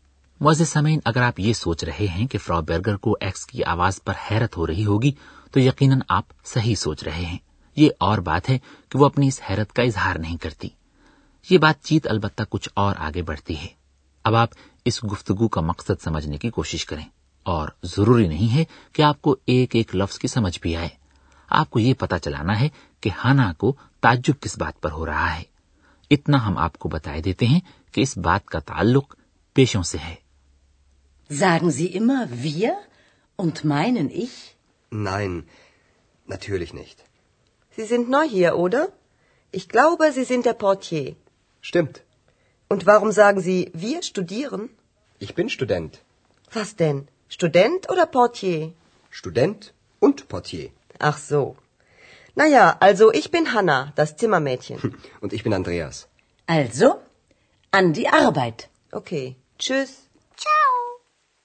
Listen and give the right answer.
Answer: اسے تعجب اس بات پر ہو رہا ہے کہ اب تو اندریاز یہ کہہ رہا ہے کہ وہ ایک طالب علم ہے جبکہ ابھی کچھ دیر پہلے اس نے اس کے ساتھ گفتگو میں یہ کہا تھا کہ وہ استقبالیہ clerk ہے